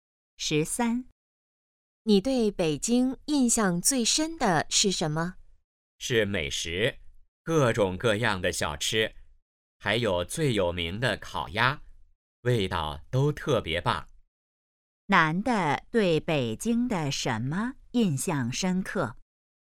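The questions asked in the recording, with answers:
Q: 男的对北京的什么印象深刻?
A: 美食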